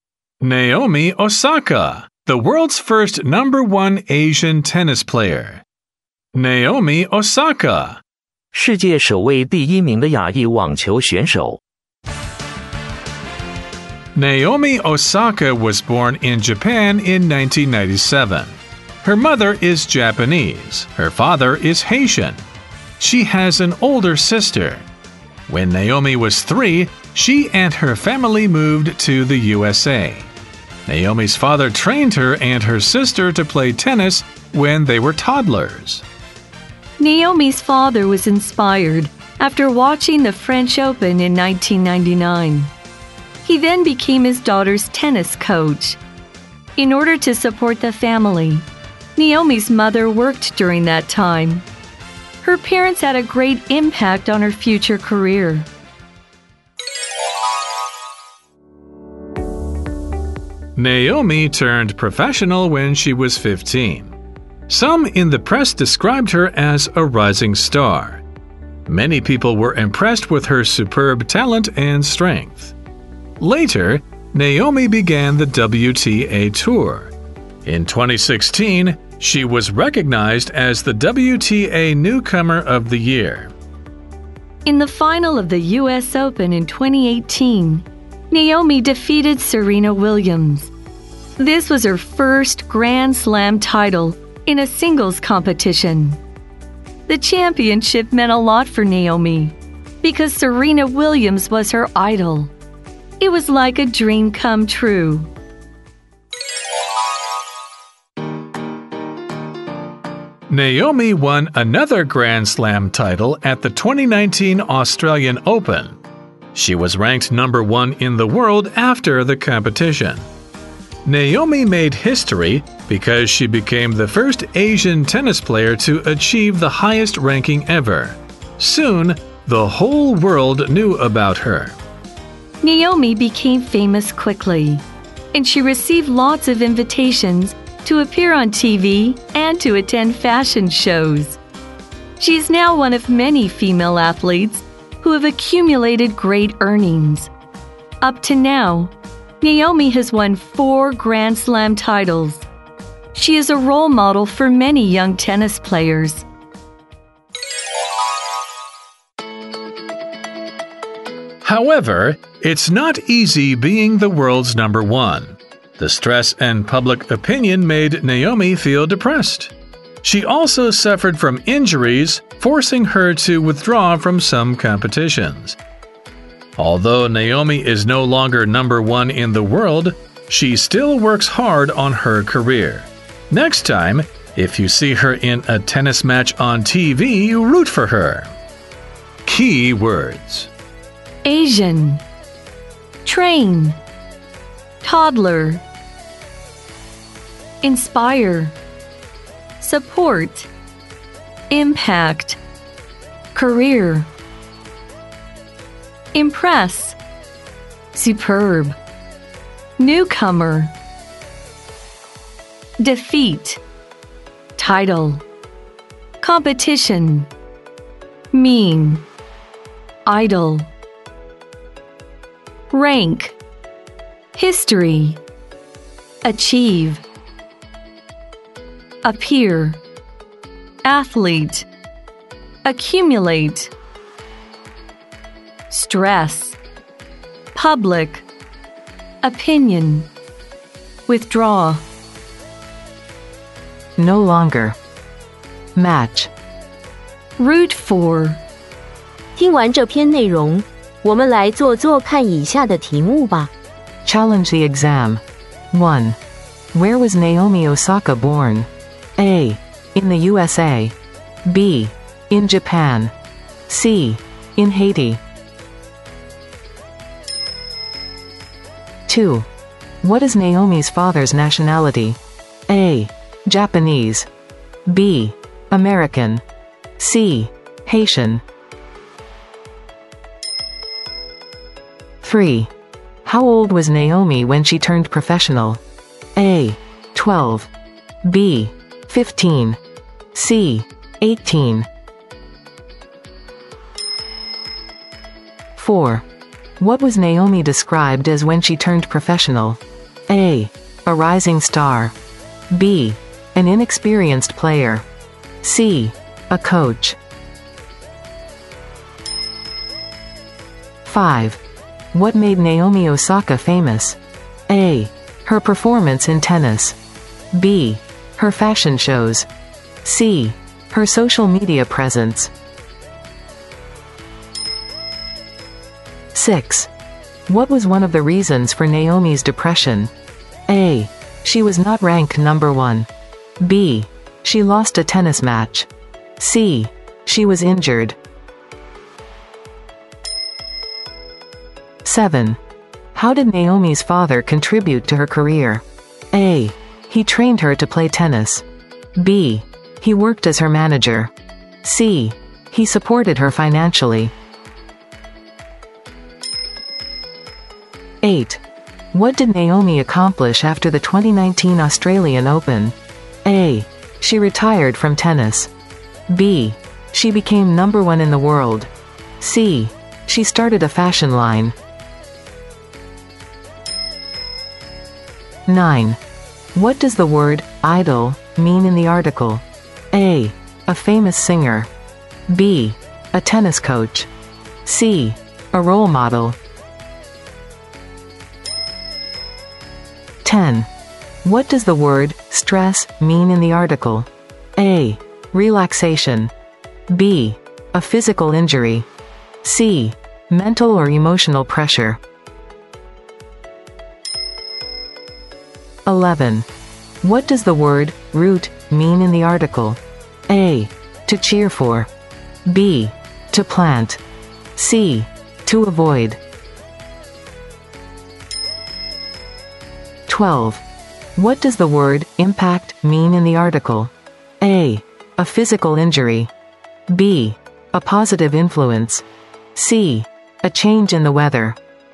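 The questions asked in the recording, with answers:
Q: Where was Naomi Osaka born?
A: B: In Japan.

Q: What is Naomi's father's nationality?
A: C: Haitian.

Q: How old was Naomi when she turned professional?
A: B: 15.

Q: What was Naomi described as when she turned professional?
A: A: A rising star.

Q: What made Naomi Osaka famous?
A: A: Her performance in tennis.

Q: How did Naomi's father contribute to her career?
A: A: He trained her to play tennis.

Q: What did Naomi accomplish after the 2019 Australian Open?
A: B: She became number one in the world.

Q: What does the word idol mean in the article?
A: C: A role model.

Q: What does the word stress mean in the article?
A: C: Mental or emotional pressure.

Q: What does the word root mean in the article?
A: A: To cheer for.

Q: What does the word impact mean in the article?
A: B: A positive influence.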